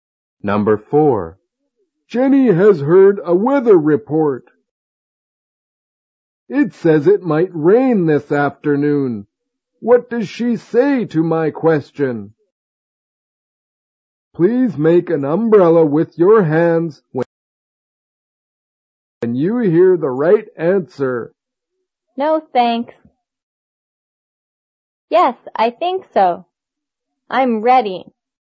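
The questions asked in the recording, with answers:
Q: What does she say to my question?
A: Yes, I think so.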